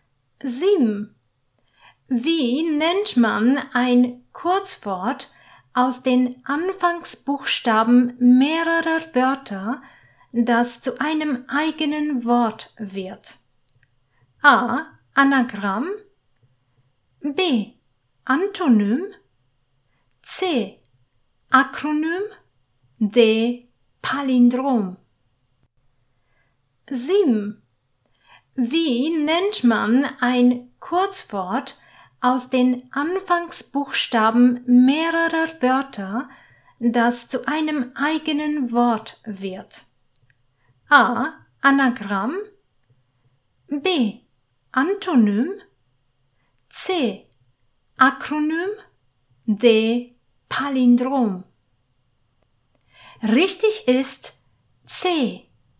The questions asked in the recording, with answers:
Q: Wie nennt man ein Kurzwort aus den Anfangsbuchstaben mehrerer Wörter, das zu einem eigenen Wort wird?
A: Richtig ist C.